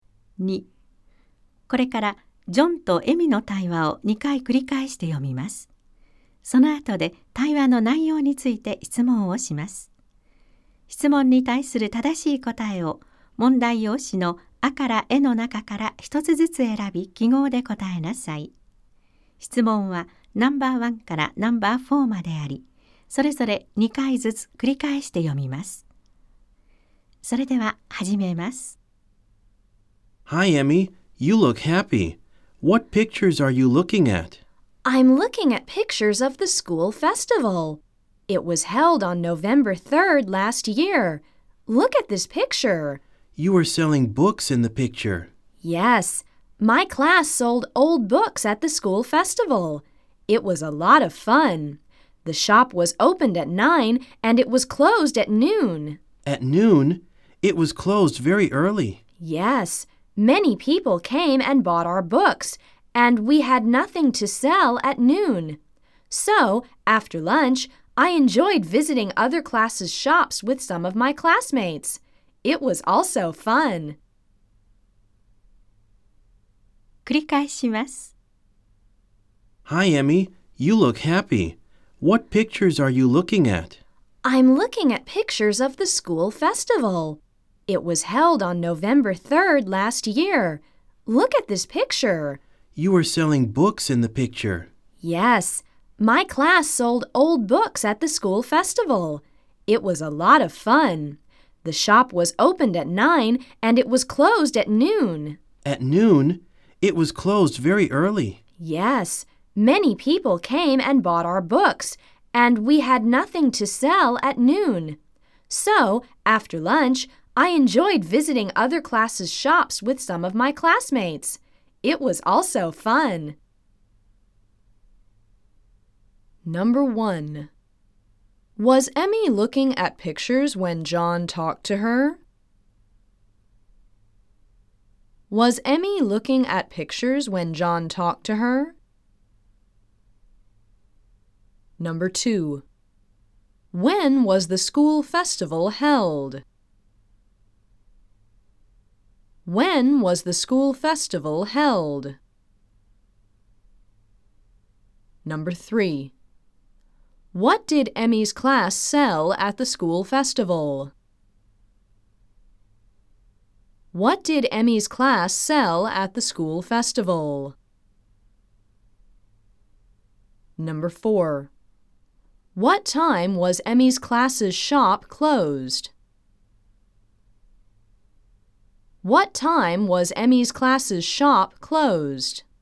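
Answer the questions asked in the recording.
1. Yes, she was.
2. On November 3rd last year.
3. Old books.
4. At noon.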